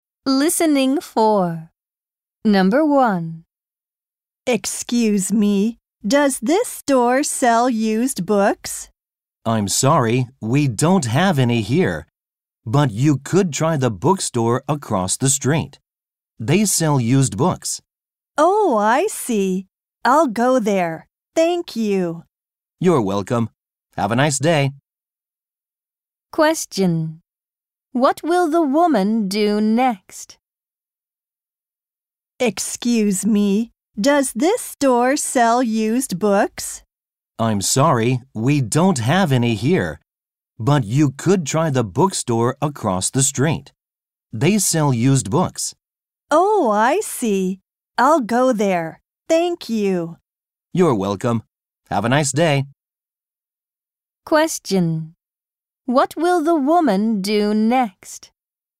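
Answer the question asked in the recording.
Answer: Go to the bookstore across the street.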